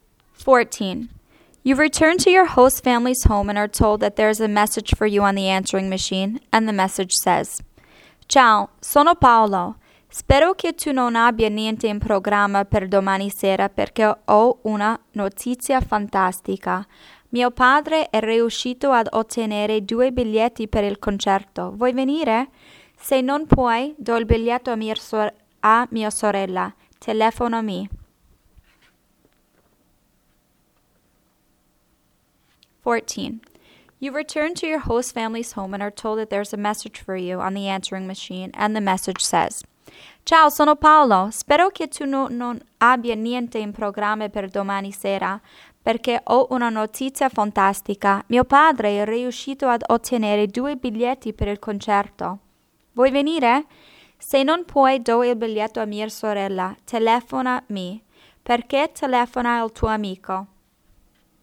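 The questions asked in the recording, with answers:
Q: Perché telefona al tuo amico?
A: Per invitarti al concerto domani sera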